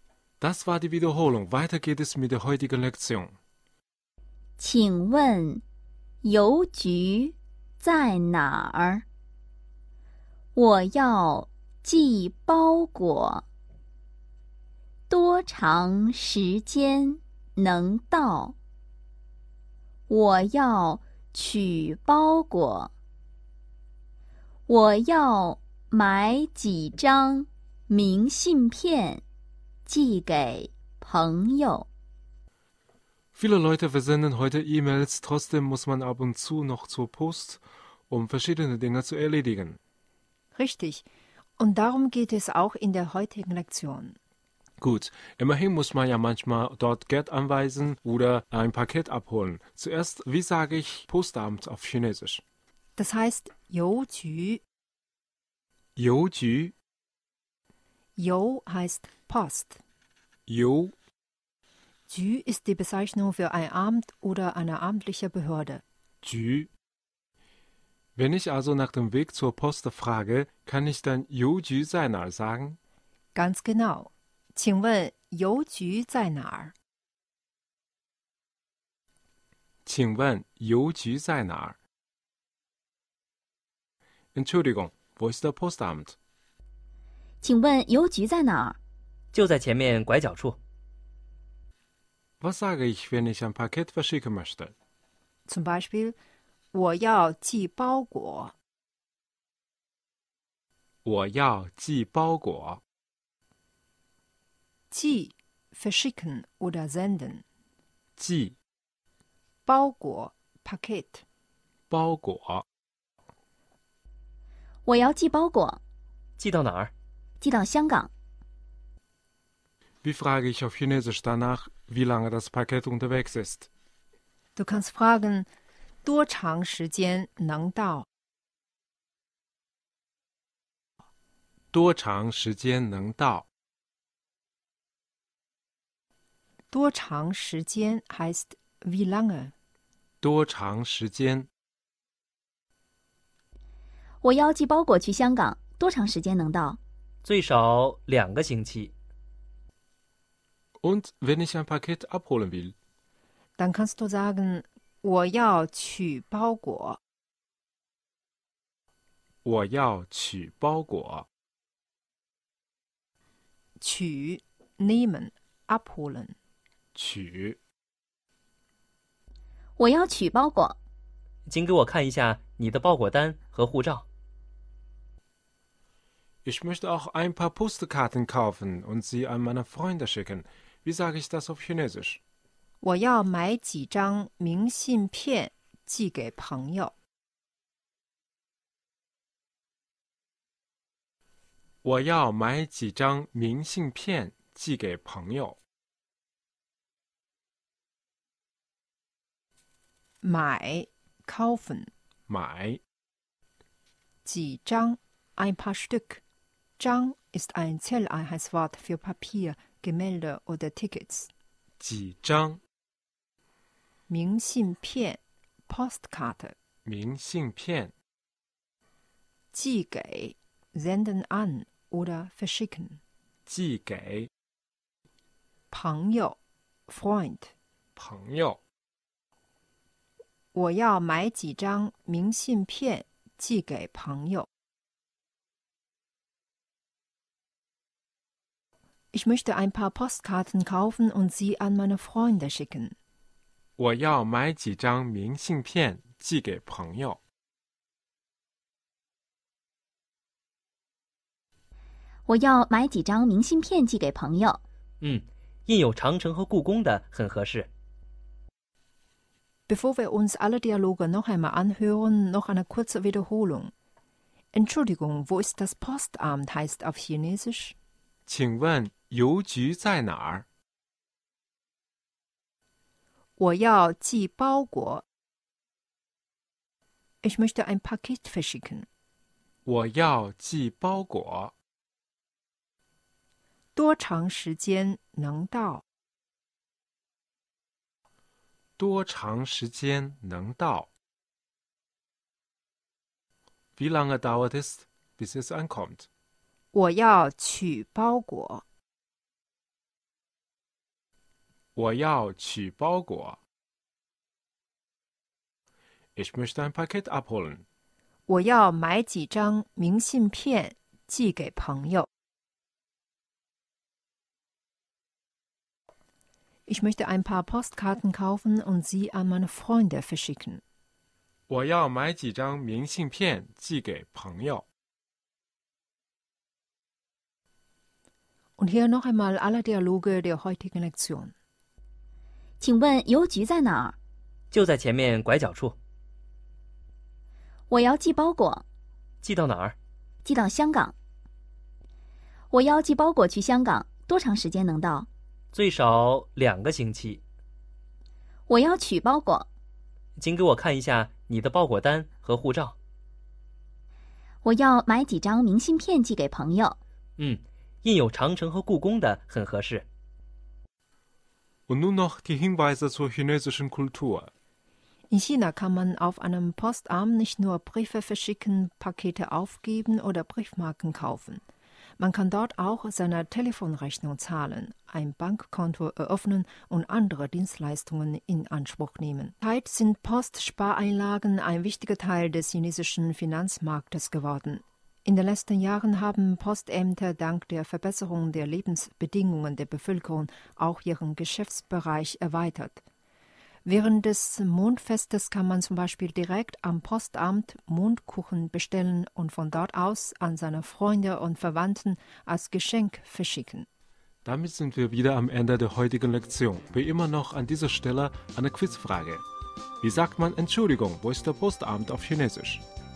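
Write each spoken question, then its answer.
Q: Wie sagt man Entschuldigung, wo ist der Postamt auf Chinesisch?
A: 请问邮局在哪儿?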